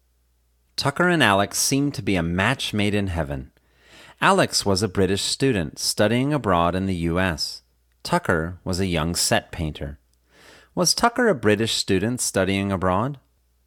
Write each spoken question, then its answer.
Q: Was Tucker a British student studying abroad?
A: No, Tucker wasn't a British student studying abroad.